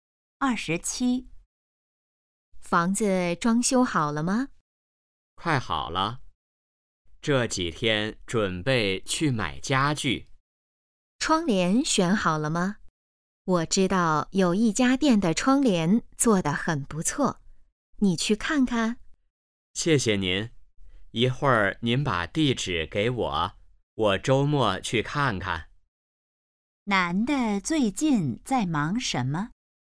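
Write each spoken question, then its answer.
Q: 男的最近在忙什么?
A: 装修房子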